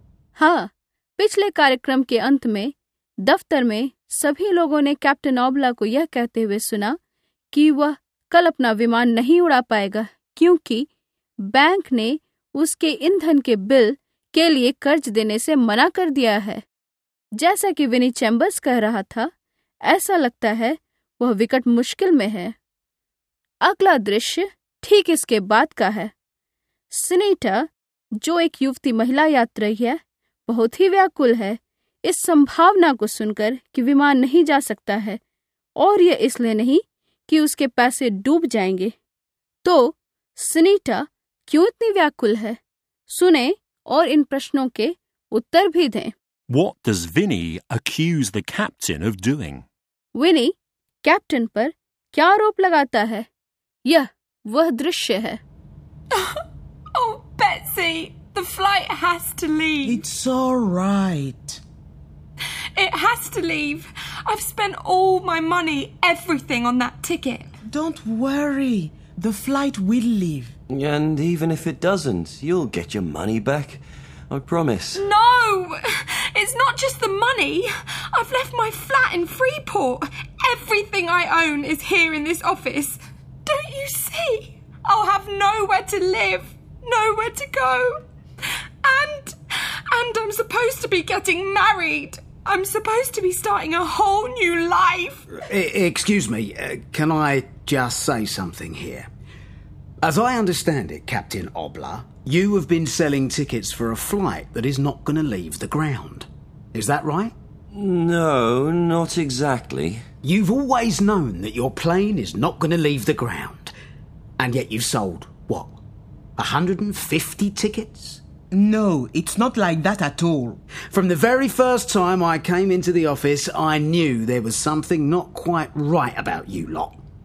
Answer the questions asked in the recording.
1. I've left my flat in Freeport Everything I own is here in this office.
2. You've always known that your plane is not going to leave the ground, and yet you've sold 150 tickets?